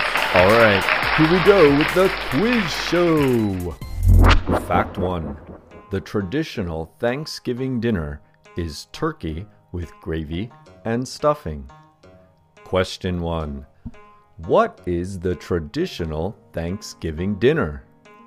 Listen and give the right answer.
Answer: Yes, the traditional Thanksgiving dinner is turkey with gravy and stuffing.